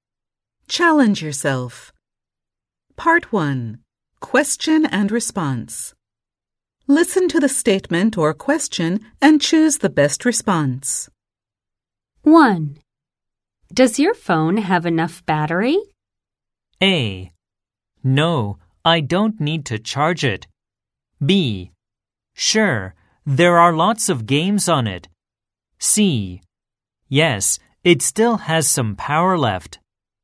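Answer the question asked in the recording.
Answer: C: Yes, it still has some power left.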